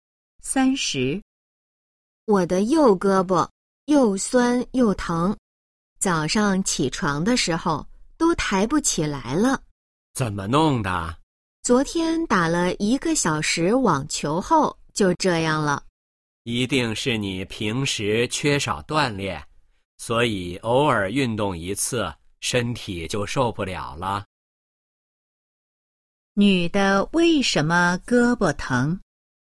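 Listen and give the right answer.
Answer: 昨天打了一个小时网球(平时缺少锻炼)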